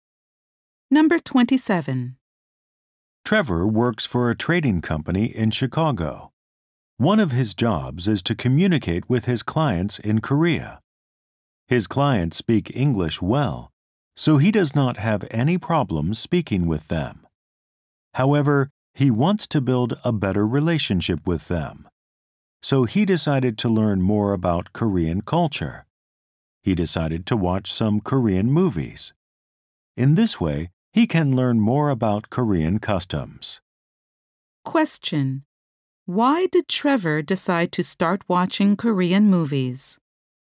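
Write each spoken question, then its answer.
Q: Why did Trevor decide to start watching Korean movies?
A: To learn about Korean culture and customs.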